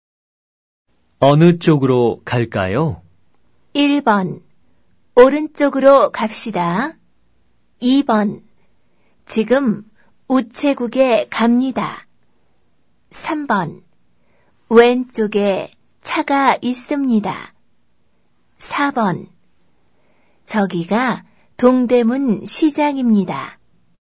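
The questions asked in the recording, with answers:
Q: 어느 쪽으로 갈까요?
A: 1: 오른쪽으로 갑시다.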